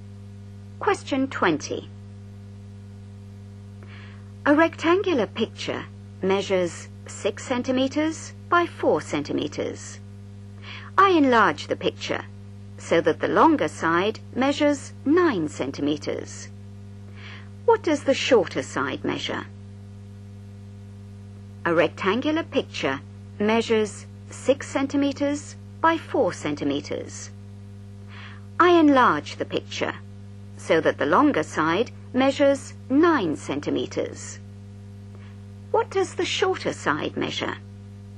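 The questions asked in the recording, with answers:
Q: What does the shorter side measure?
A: 6 cm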